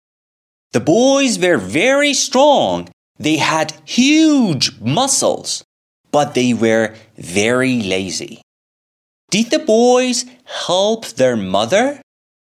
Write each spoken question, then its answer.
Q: Did the boys help their mother?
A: No. They didn't help their mother.